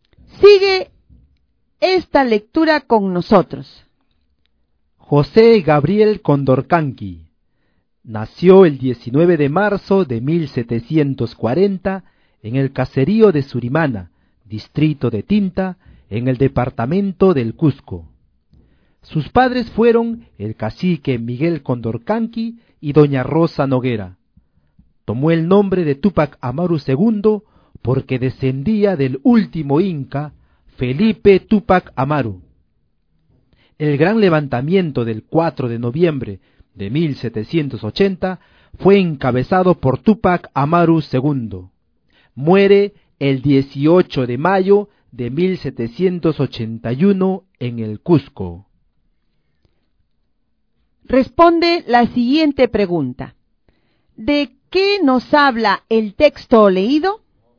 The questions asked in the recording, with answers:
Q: ¿De qué nos habla el texto leído?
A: El texto leído nos habla de la vida de José Gabriel Condorcanqui, más conocido como Túpac Amaru II.